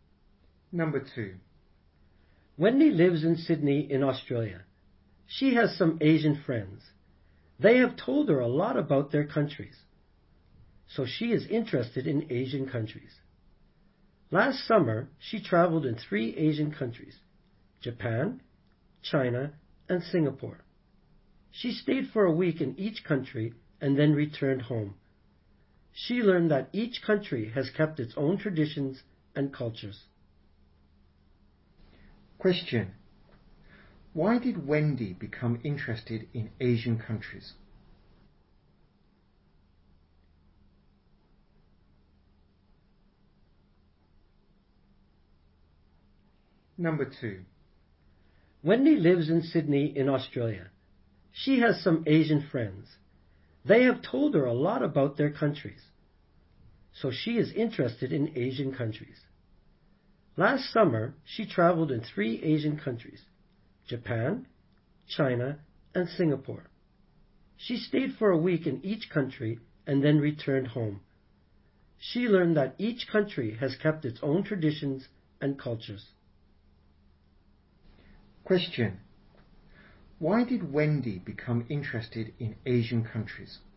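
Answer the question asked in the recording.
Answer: Her Asian friends told her a lot about their countries.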